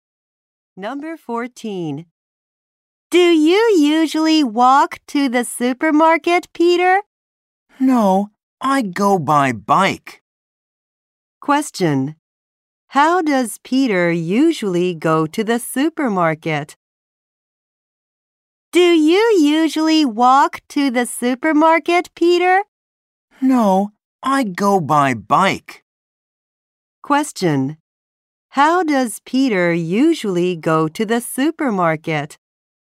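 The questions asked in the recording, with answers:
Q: How does Peter usually go to the supermarket?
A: By bike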